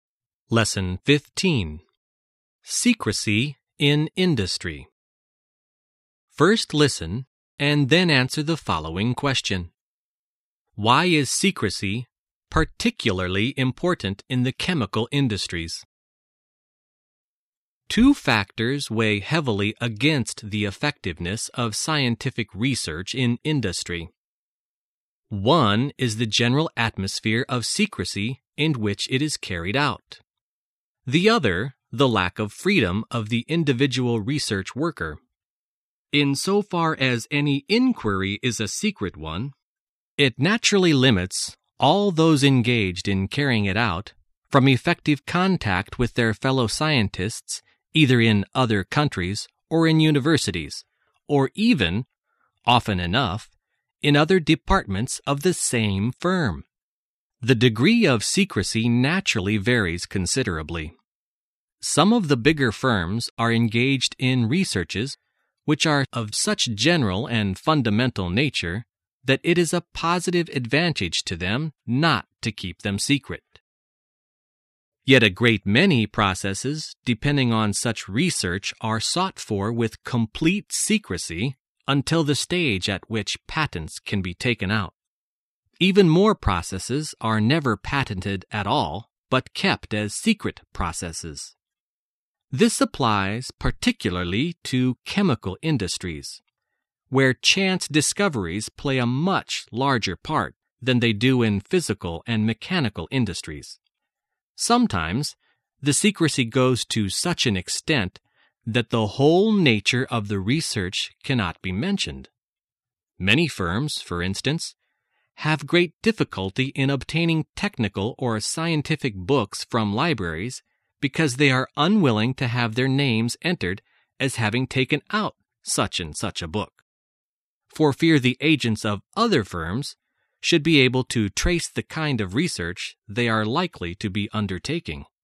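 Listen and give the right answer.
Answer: Because chance discoveries play a much larger part there than in physical and mechanical industries.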